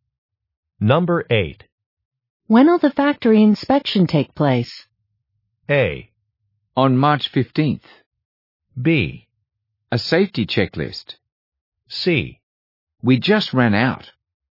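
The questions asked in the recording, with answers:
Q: When will the factory inspection take place?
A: A: On March 15th.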